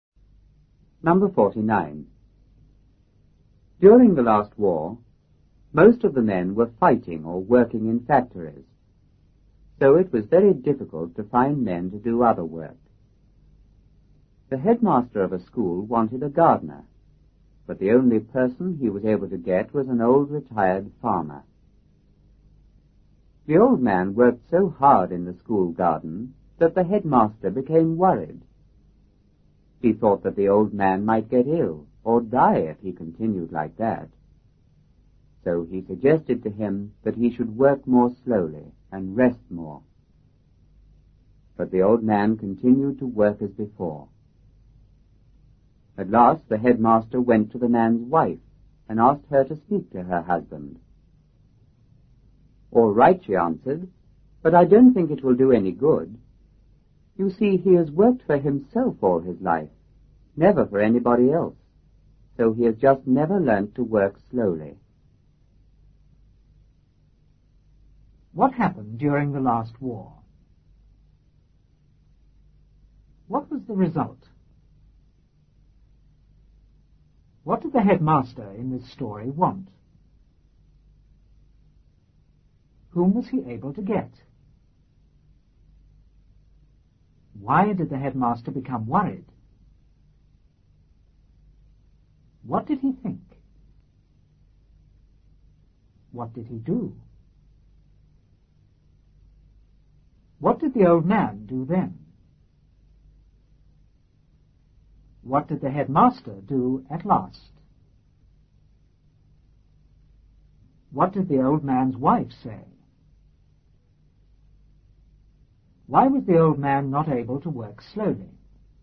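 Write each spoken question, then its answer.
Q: What happened during the last war?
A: Most men were fighting or working in factories

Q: What was the result?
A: It was very difficult to find men to do other work

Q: What did the headmaster in this story want?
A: A gardener

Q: Whom was he able to get?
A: An old retired farmer

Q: Why did the headmaster become worried?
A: The old man worked so hard in the garden

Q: What did he think?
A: The old man might get ill or die if he continued like that

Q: What did he do?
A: Suggested he work more slowly and rest more

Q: What did the old man do then?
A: Continued to work as before

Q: What did the headmaster do at last?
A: Went to the man's wife and asked her to speak to her husband

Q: What did the old man's wife say?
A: All right, but she didn't think it would do any good

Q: Why was the old man not able to work slowly?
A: He had always worked for himself, never for anybody else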